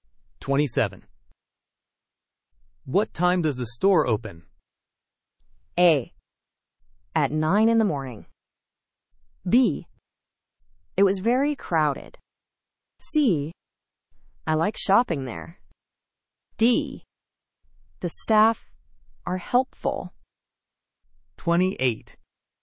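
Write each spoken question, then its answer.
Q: What time does the store open?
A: A: At 9 in the morning.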